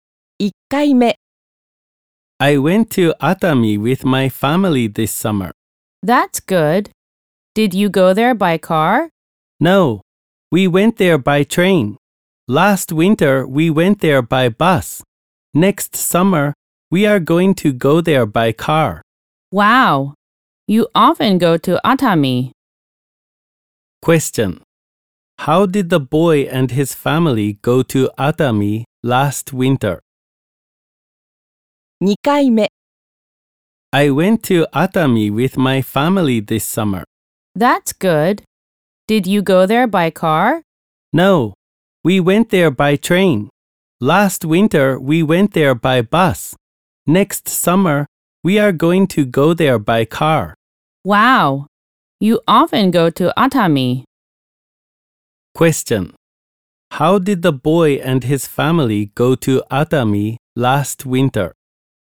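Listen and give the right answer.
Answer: By bus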